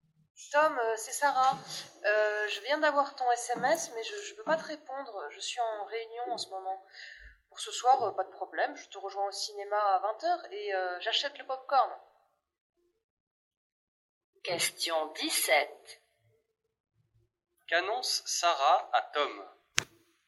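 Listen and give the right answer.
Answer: Elle le rejoindra au cinéma à 20h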